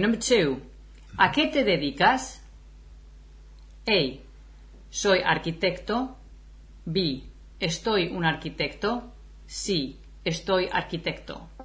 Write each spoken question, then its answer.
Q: ¿A qué te dedicas?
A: So I would say, soy arquitecto.